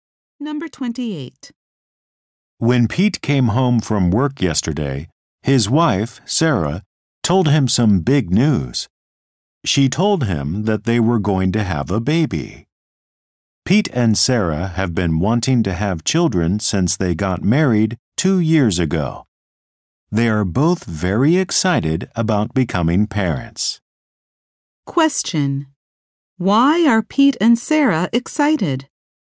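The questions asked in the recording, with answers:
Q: Why are Pete and Sarah excited?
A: They are going to have a baby.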